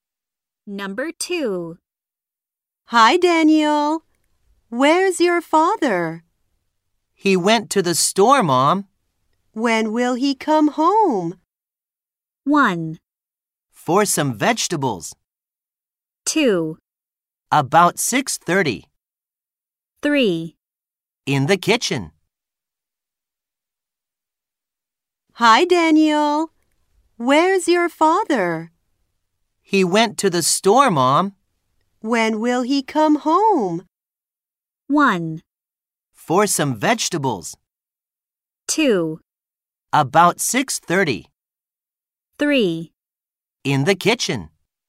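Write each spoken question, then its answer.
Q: When will he come home?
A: 2: About 6:30.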